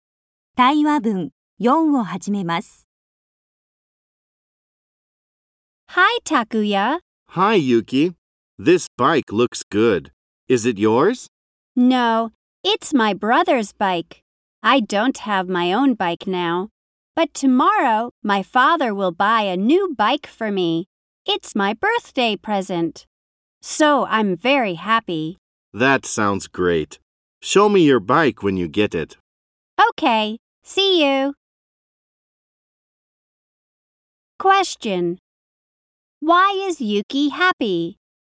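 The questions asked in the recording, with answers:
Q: Why is Yuki happy?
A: Because her father will buy her a new bike tomorrow as a birthday present.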